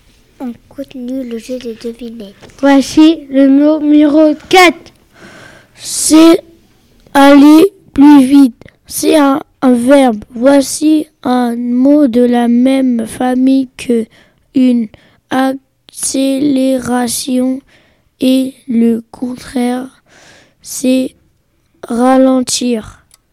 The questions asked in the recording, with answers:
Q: C'est aller plus vite. C'est un verbe.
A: C'était le mot accélérer.